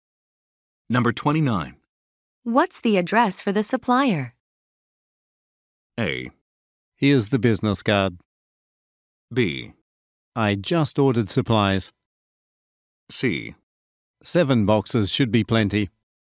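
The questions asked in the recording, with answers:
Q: What's the address for the supplier?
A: A: Here's the business card.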